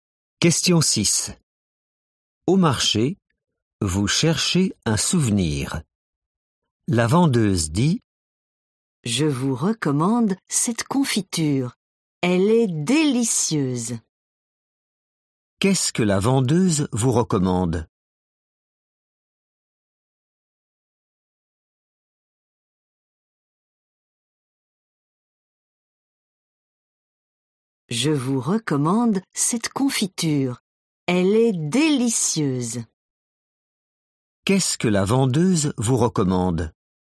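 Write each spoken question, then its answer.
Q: Qu'est-ce que la vendeuse vous recommande ?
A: de la confiture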